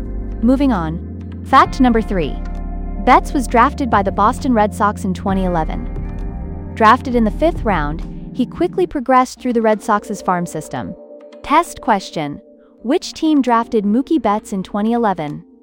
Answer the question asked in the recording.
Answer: Correct answer. Boston Red Sox.